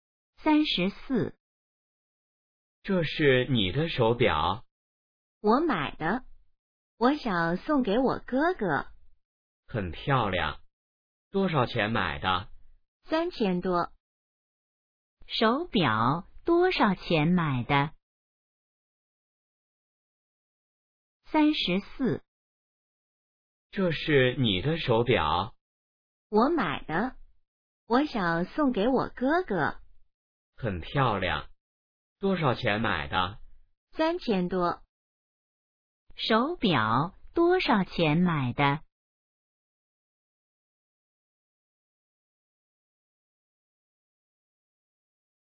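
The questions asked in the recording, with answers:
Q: 手表多少钱买的?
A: 3000多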